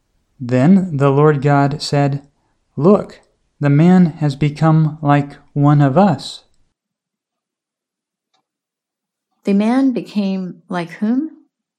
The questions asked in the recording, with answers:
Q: The man became like whom?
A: The man became like God.